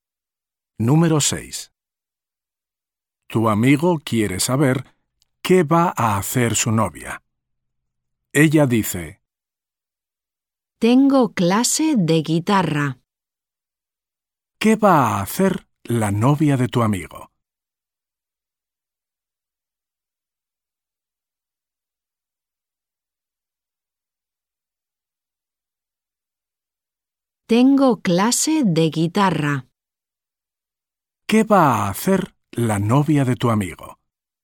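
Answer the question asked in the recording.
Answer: tiene clase de guitarra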